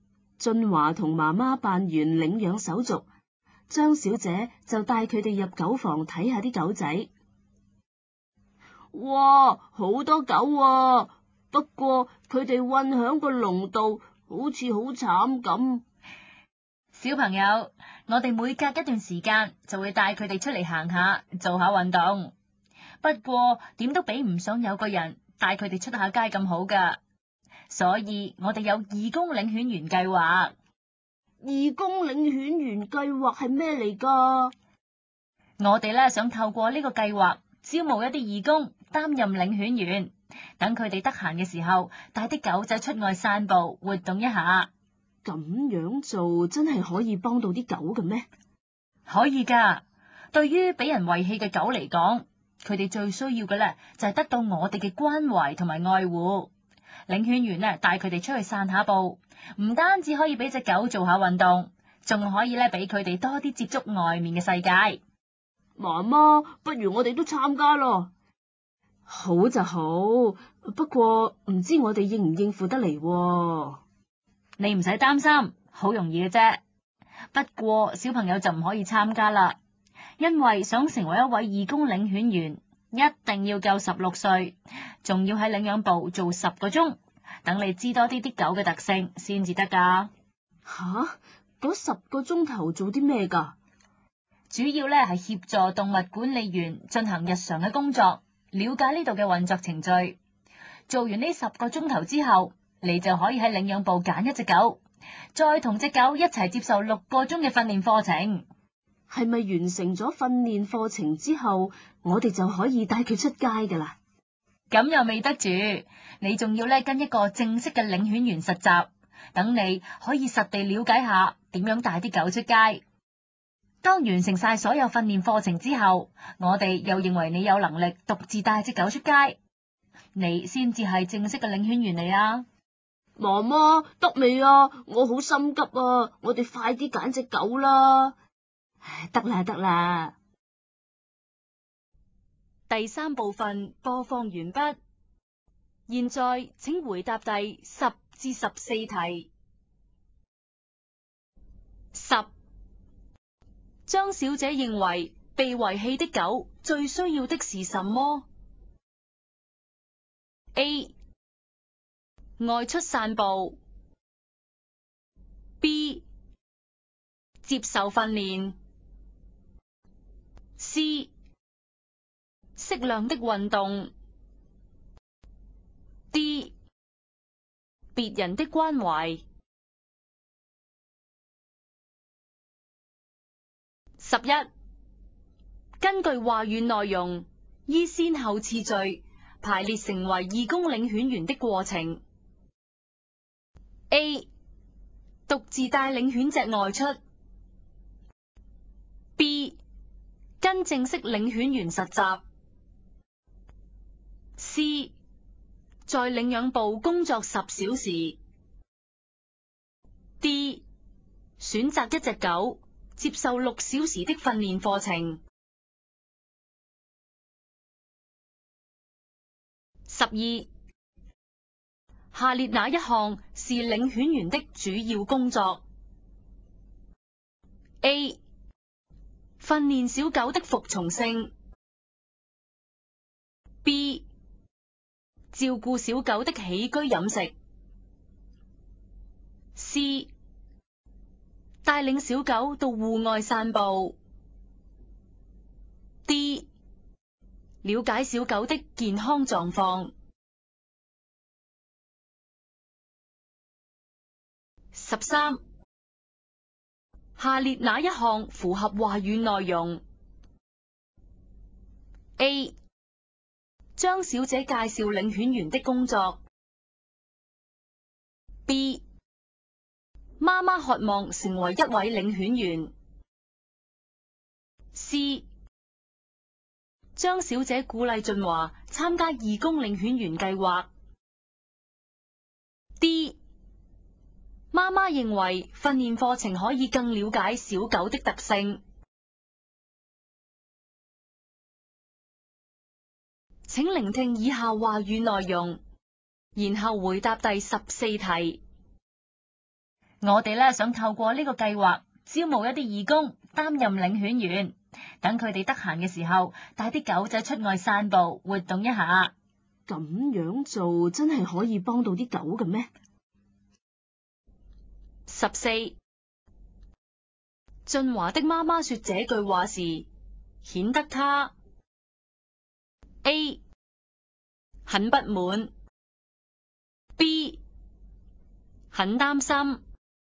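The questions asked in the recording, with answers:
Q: 张小姐认为被遗弃的狗最需要的是什么 ?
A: D: 别人的关怀。

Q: 根据话语内容,依先后次序排列成为义工领犬员的过程。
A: C, D, B, A

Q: 下列哪一项是领犬员的主要工作 ?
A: C: 带领小狗到户外散步。

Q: 下列哪一项符合话语内容 ?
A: A: 张小姐介绍领犬员的工作。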